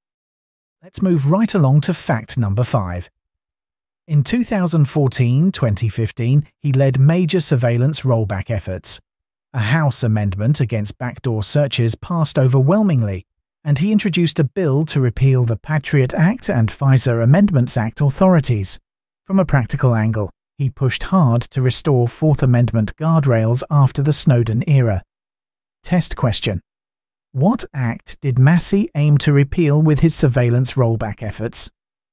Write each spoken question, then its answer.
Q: What act did Massie aim to repeal with his surveillance rollback efforts?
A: the Patriot Act.